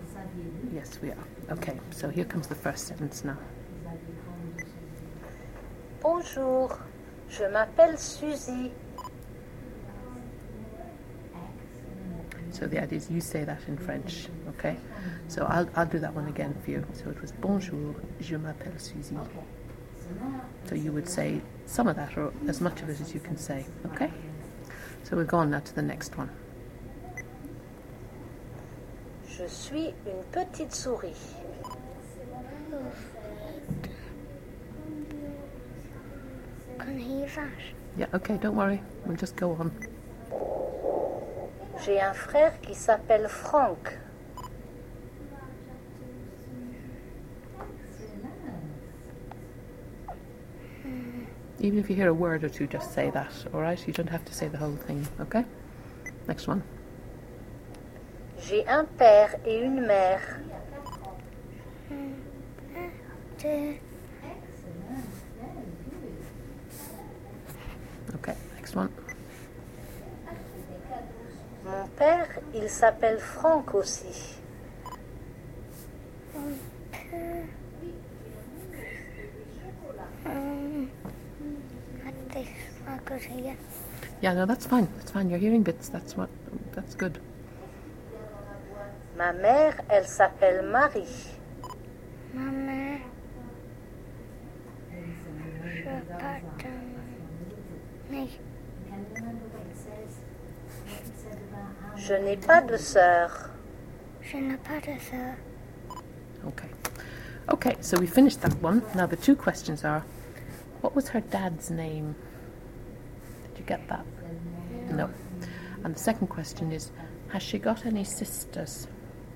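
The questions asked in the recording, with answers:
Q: what was her dad's name?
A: Franck

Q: has she got any sisters?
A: No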